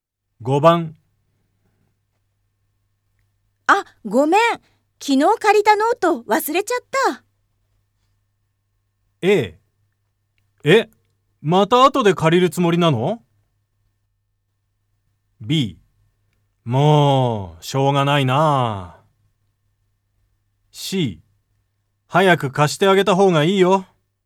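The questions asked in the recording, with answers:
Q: あ、ごめん。昨日借りたノート忘れちゃった。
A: B: もうしょうがないな。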